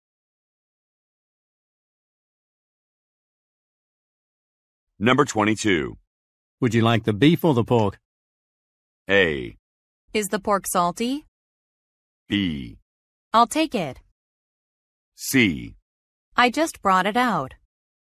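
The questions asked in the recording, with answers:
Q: Would you like the beef or the pork?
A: A: Is the pork salty?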